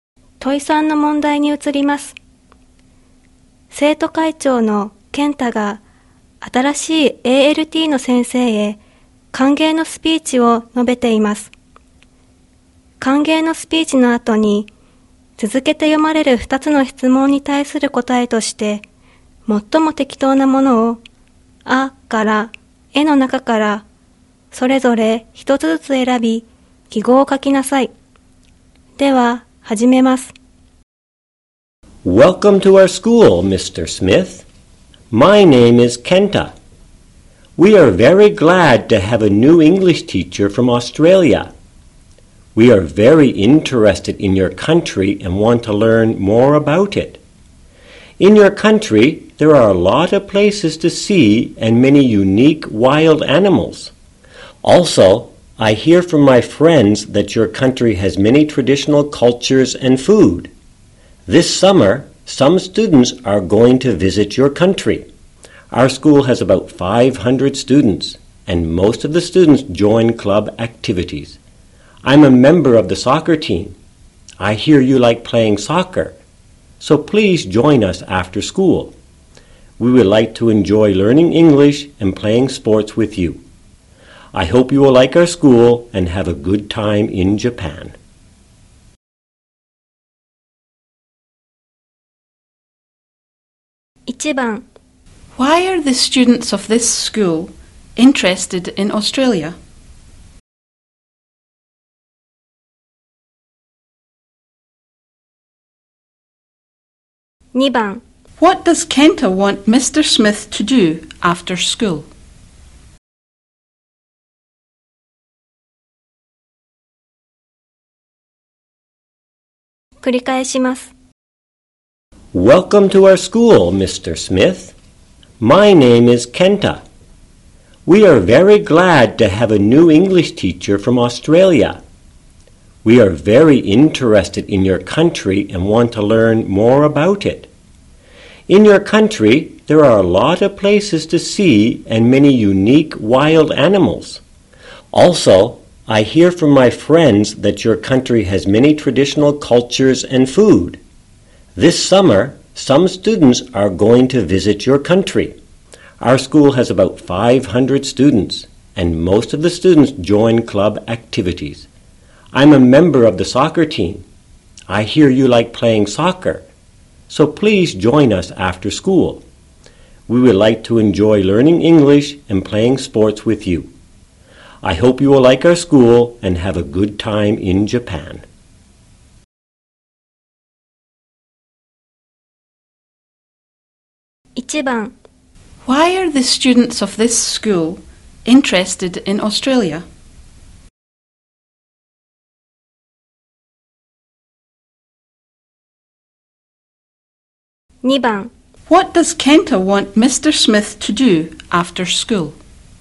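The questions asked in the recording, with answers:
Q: What does Kenta want Mr. Smith to do after school?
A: To play soccer with the soccer team.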